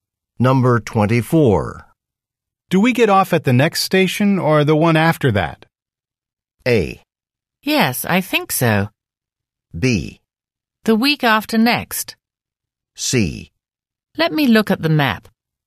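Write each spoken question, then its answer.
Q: Do we get off at the next station or the one after that?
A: C: Let me look at the map.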